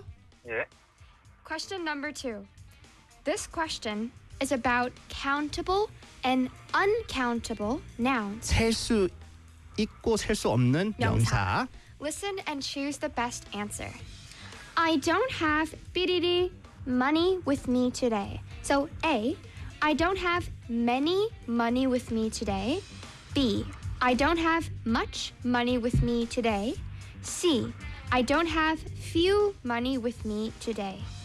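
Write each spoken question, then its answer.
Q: I don't have bididi. Money with me today.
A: B: I don't have much money with me today.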